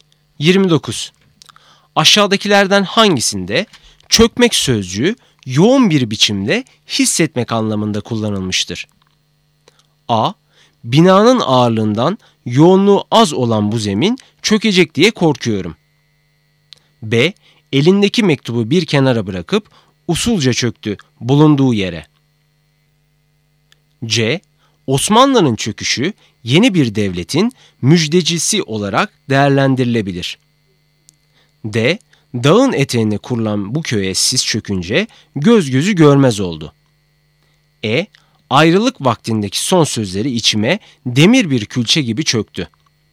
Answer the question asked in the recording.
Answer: Doğru cevap E. Ayrılık vaktindeki son sözleri içime demir bir külçe gibi çöktü.